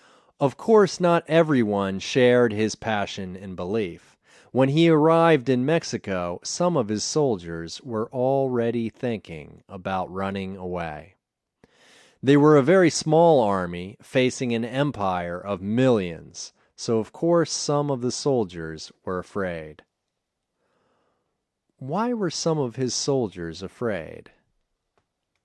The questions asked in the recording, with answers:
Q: Why were some of his soldiers afraid?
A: They were afraid because they were a very small army facing an empire of millions.